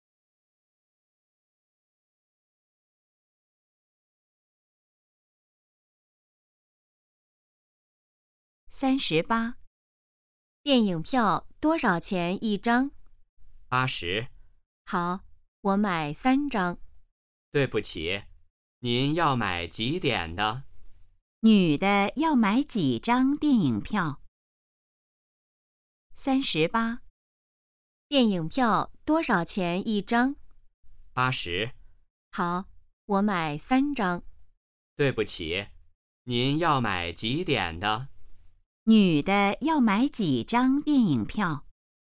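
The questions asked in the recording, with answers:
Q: 女的要买几张电影票?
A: 三张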